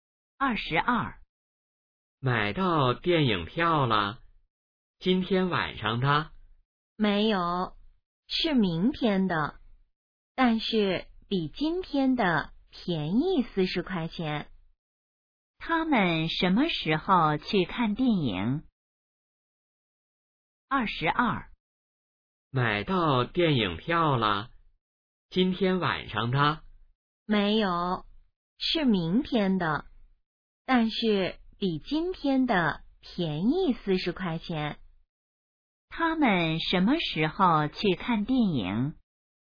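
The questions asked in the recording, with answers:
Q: 他们什么时候去看电影?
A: 明天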